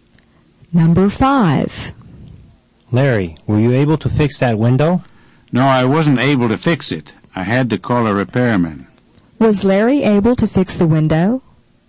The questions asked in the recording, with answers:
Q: Was Larry able to fix the window?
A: The answer is no. He wasn't able to fix the window.